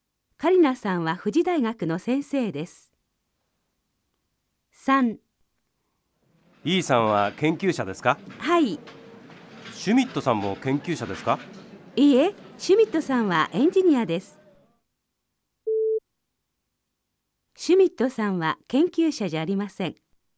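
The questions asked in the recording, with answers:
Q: シュミットさんは研究者じゃありません。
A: ○ (正しい)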